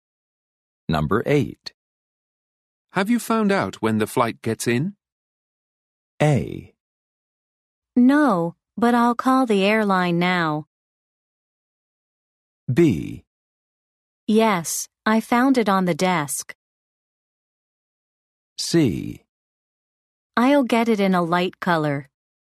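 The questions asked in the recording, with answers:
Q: Have you found out when the flight gets in?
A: A: No, but I'll call the airline now.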